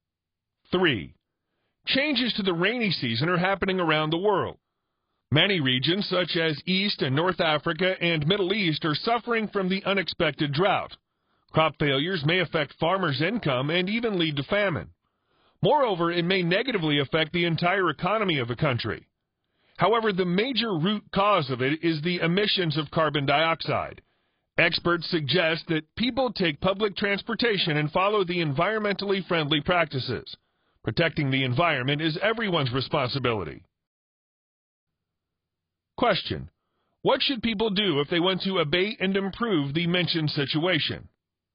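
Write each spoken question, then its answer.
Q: what should people do if they want to abate and improve the mentioned situation?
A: Take public transportation and follow environmentally friendly practices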